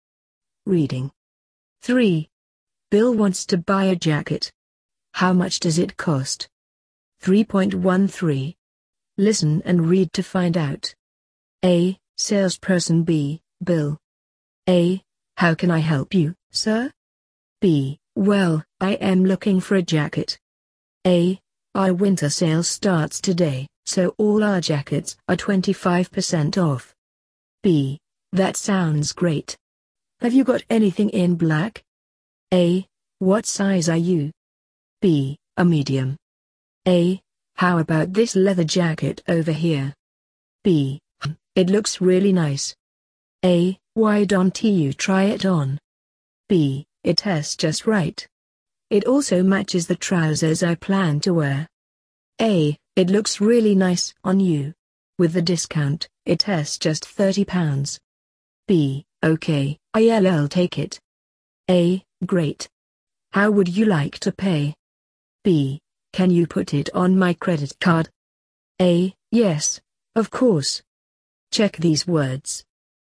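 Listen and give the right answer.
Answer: £30 (with the 25% discount)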